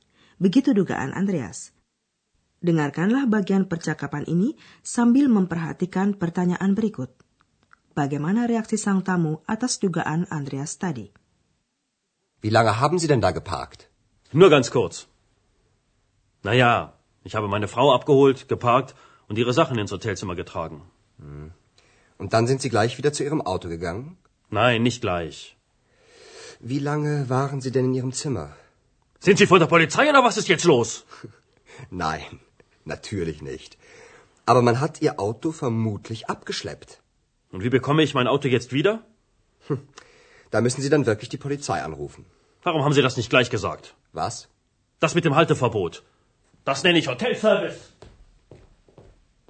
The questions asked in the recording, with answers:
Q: Bagaimana reaksi sang tamu atas dugaan Andreas tadi?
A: Karena jengkel gara-gara mobilnya itu, sang tamu menuding Andreas.